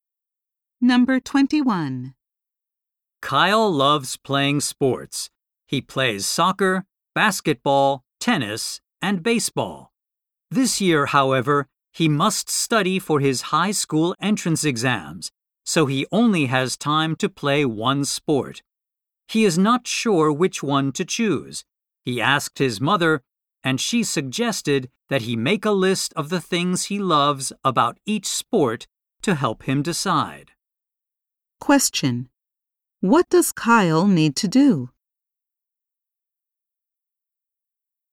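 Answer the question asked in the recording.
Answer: Choose one sport to play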